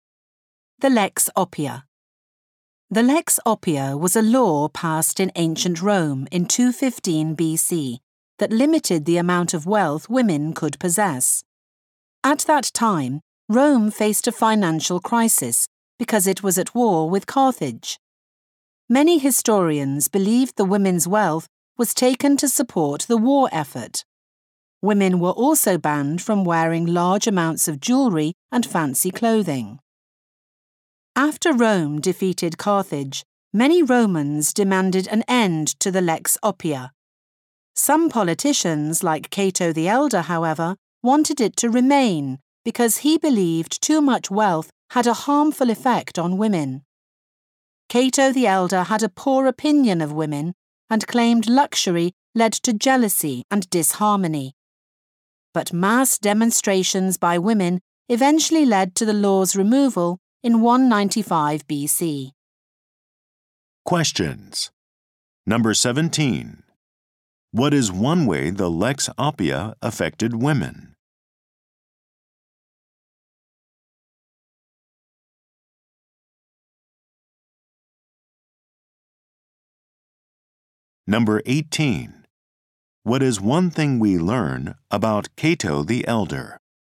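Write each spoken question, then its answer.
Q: What is one way the Lex Oppia affected women?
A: It limited the amount of wealth they could have and banned them from wearing much jewellery and fancy clothing.

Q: What is one thing we learn about Cato the Elder?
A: He had a poor opinion of women and wanted the law to stay.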